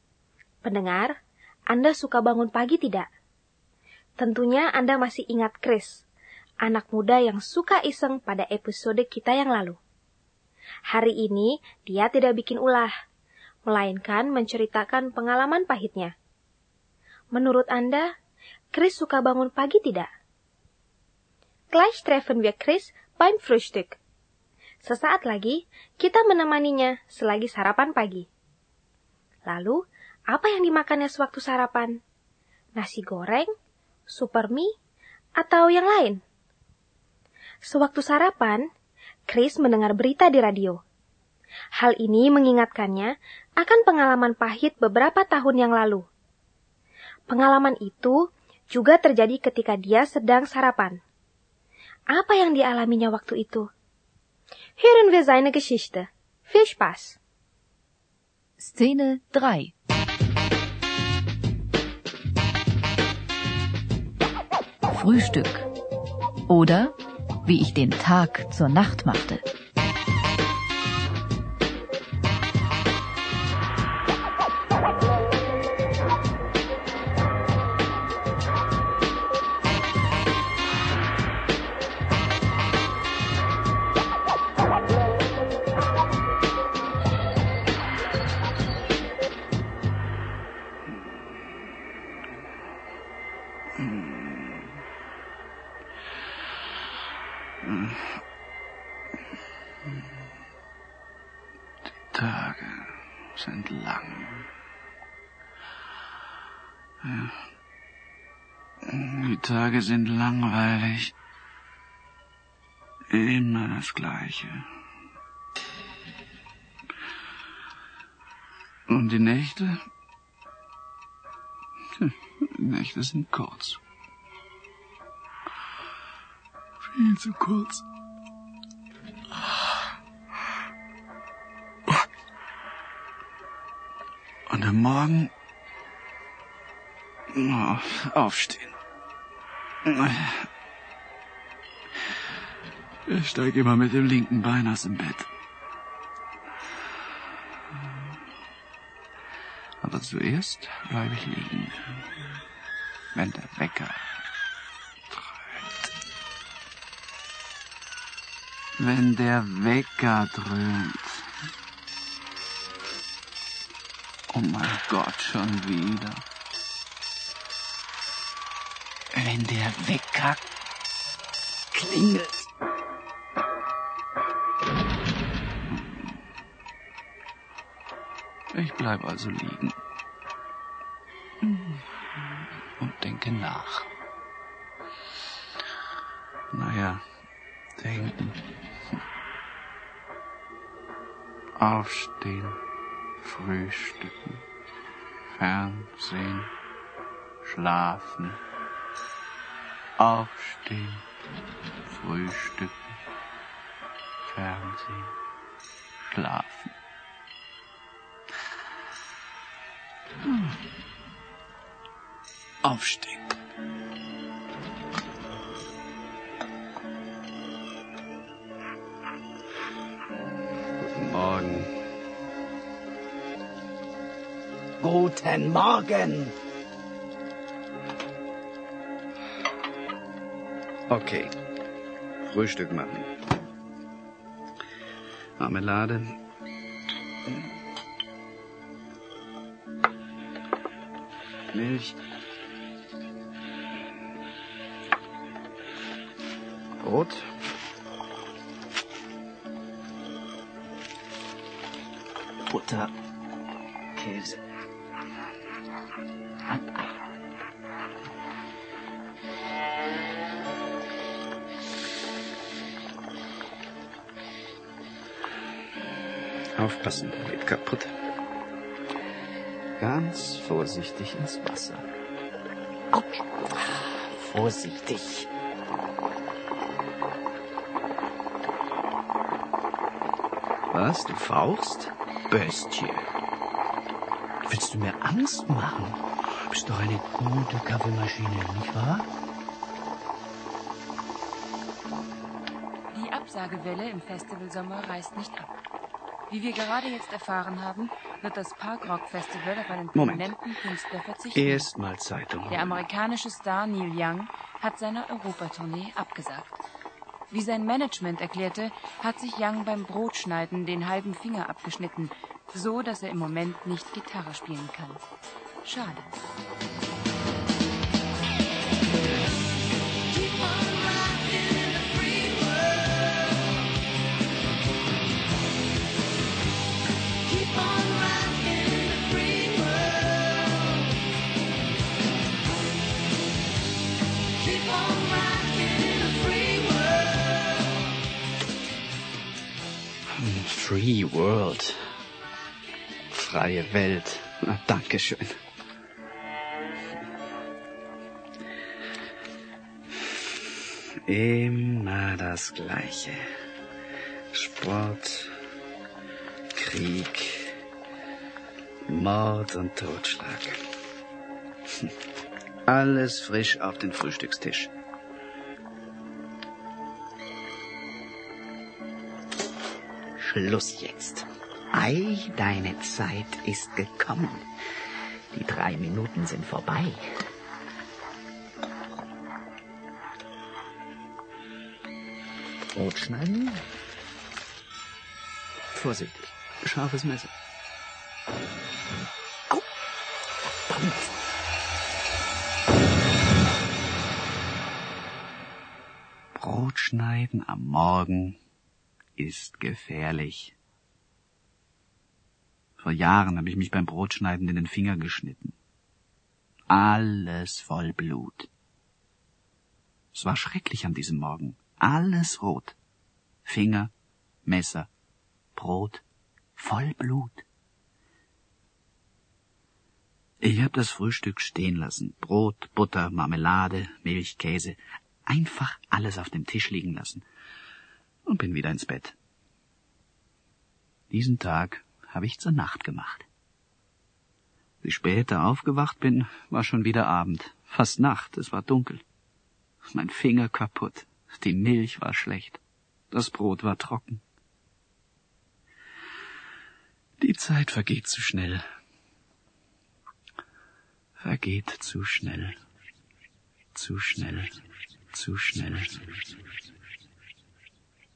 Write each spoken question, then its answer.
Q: Menurut Anda, Chris suka bangun pagi tidak?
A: Memang, Chris tidak senang bangun pagi.

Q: Lalu, apa yang dimakannya sewaktu sarapan?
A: Dia sarapan roti dengan mentega, selai, keju, telur, dan minum susu.